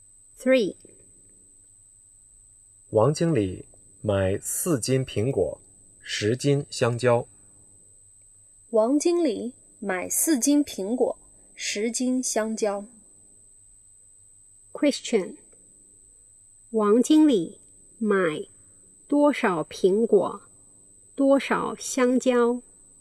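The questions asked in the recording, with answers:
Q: 王经理买多少苹果,多少香蕉?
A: 4斤苹果,10斤香蕉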